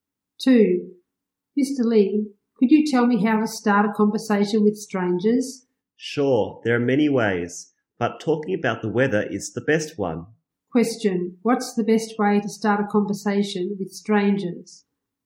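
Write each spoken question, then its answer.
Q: What's the best way to start a conversation with strangers?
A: Talking about the weather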